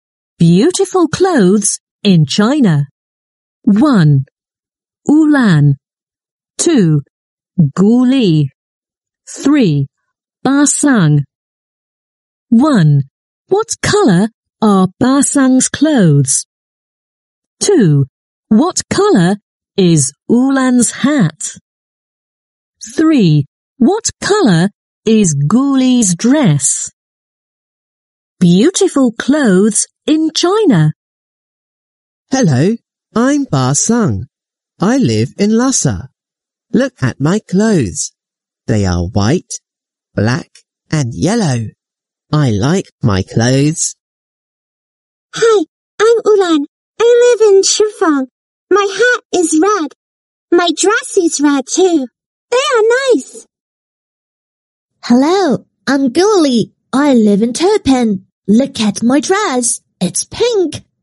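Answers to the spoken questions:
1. White, black and yellow
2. Red
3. Pink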